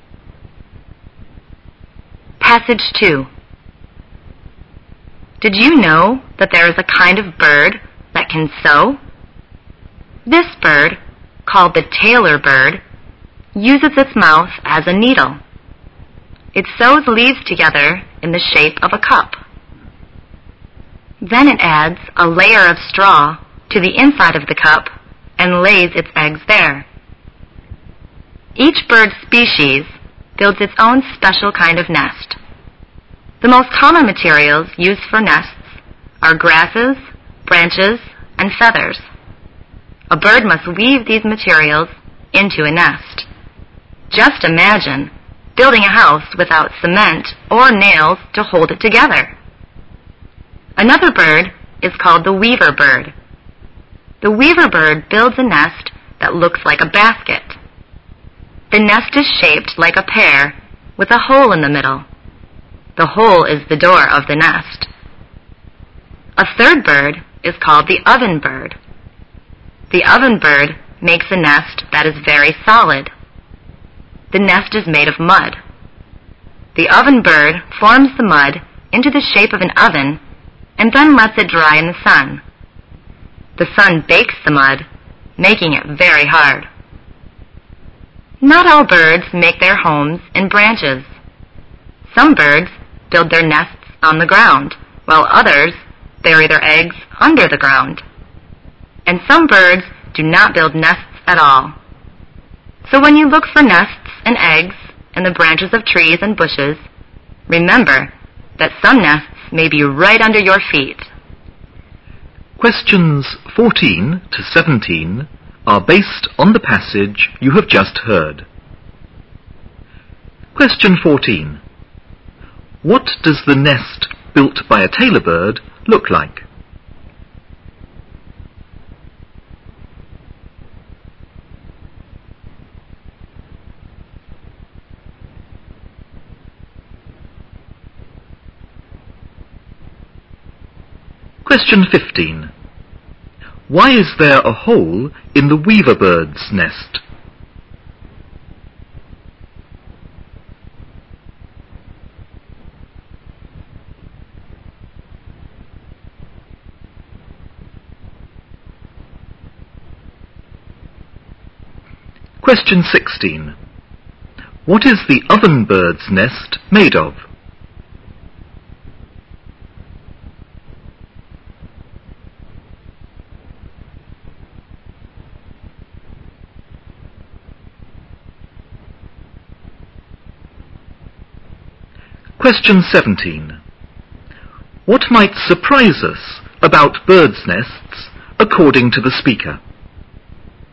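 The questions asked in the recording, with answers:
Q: What does the nest built by a tailor bird look like?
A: A cup

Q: Why is there a hole in the weaver bird's nest?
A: It serves as the door

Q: What is the oven bird's nest made of?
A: Mud

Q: What might surprise us about birds' nests according to the speaker?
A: Some nests may be on or under the ground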